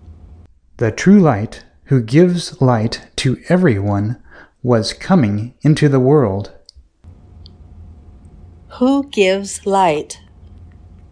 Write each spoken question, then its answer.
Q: Who gives light?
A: The true light gives light.